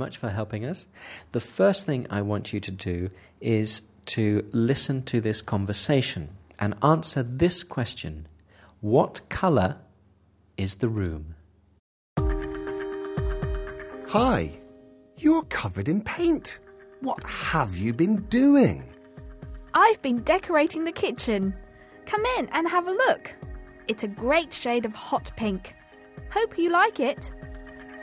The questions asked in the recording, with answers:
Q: What colour is the room?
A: The kitchen is hot pink.